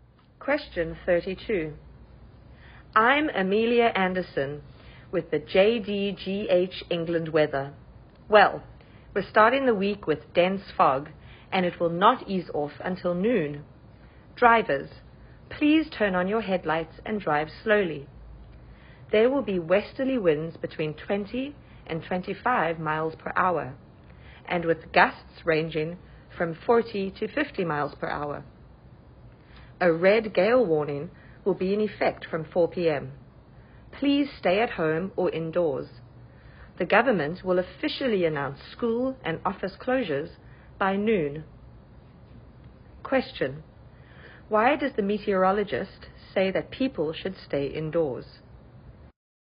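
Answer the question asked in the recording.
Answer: Because a red gale warning with strong wind gusts will be in effect from 4 p.m.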